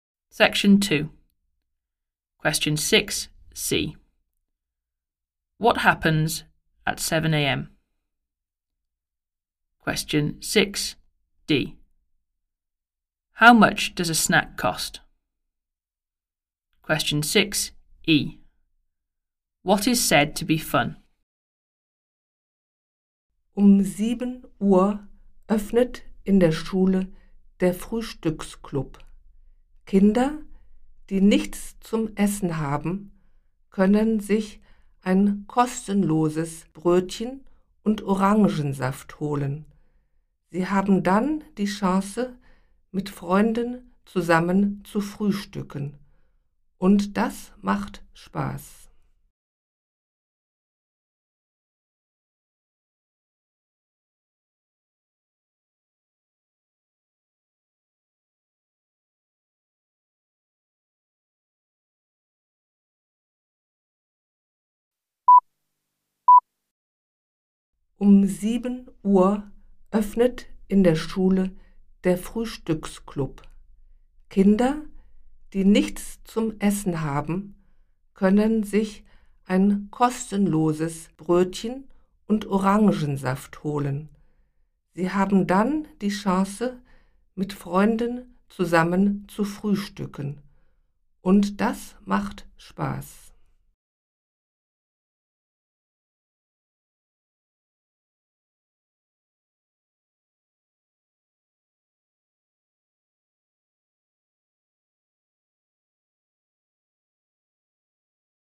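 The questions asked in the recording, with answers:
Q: What happens at 7 a.m?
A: The breakfast club opens at school

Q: How much does a snack cost?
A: Nothing, it is free

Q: What is said to be fun?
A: Having breakfast together with friends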